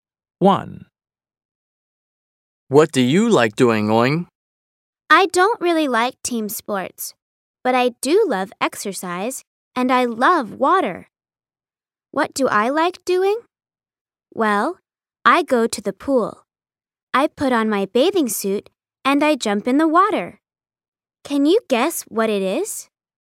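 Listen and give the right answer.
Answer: swimming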